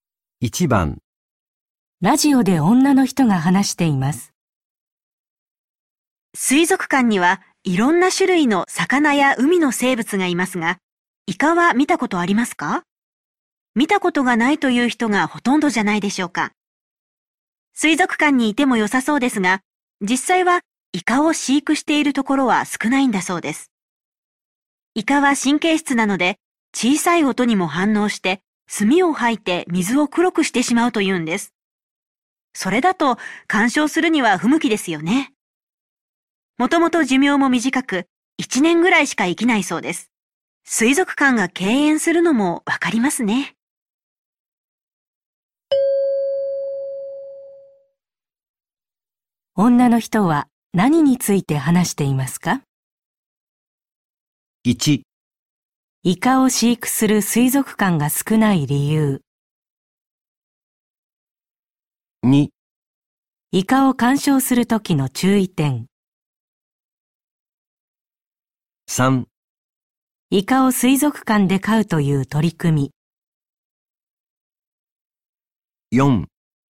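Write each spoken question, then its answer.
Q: 女の人は何について話していますか?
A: 1: イカを飼育する水族館が少ない理由。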